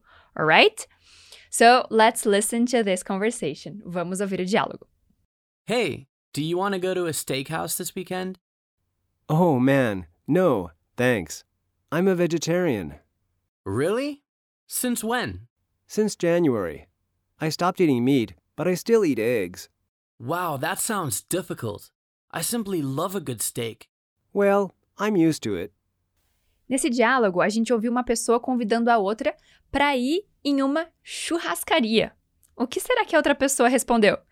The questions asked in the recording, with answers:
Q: O que será que a outra pessoa respondeu?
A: Ele é vegetariano.